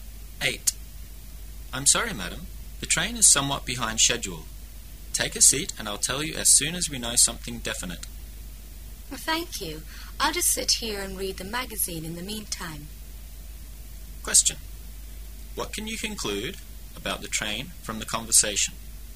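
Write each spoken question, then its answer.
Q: What can you conclude about the train from the conversation?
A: It is late, and nobody knows yet when it will arrive

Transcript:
[解析] M: I'm sorry, Madam. The train is somewhat behind the schedule. Take a seat and I'll tell you as soon as we know something definite. W: Thank you. I'll just sit here and read the magazine in the meantime. Q:What can you conclude about the train from the conversation?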